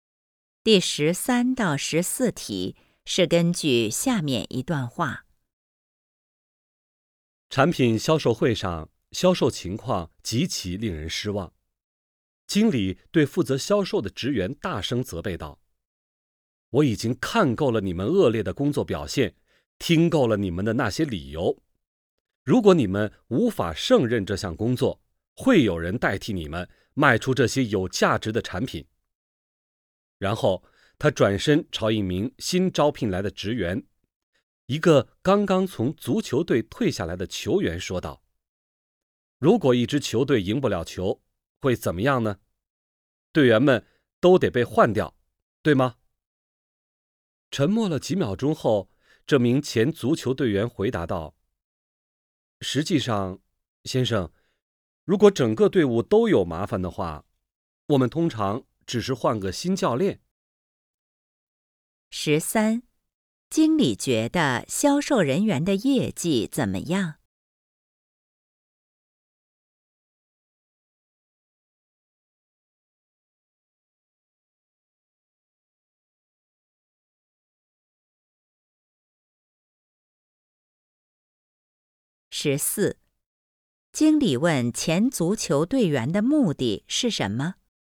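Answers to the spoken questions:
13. 极其令人失望
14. 暗示表现不好的销售人员会被换掉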